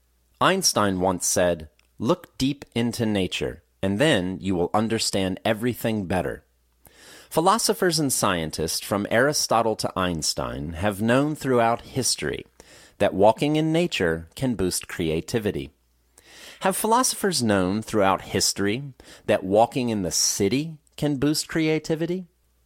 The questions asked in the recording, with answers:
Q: Have philosophers known throughout history that walking in the city can boost creativity?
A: No, they haven't known throughout history that walking in a city can boost creativity.